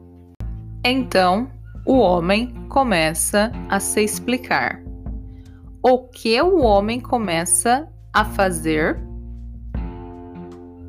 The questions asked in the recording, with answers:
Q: O que o homem começa a fazer?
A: Ele começa a se explicar